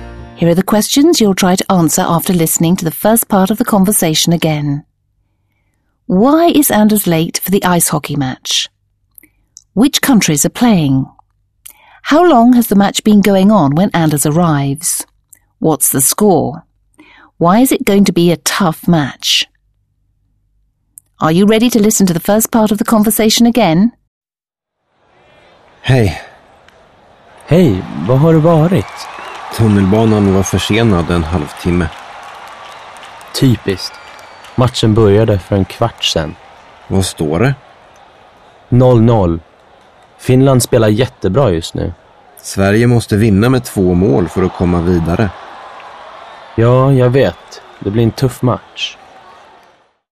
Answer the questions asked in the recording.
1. He's late because the train was half an hour delayed.
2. Sweden is playing Finland.
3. The match started a quarter of an hour ago.
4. The score is 0-0 at the moment.
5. The match is going to be tough because Finland is playing very well at the moment and because Sweden has to beat Finland by 2 goals to advance.